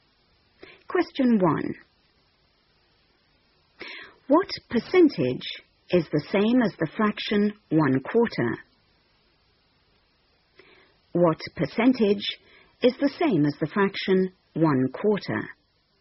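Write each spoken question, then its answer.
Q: What percentage is the same as the fraction 1/4?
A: 25%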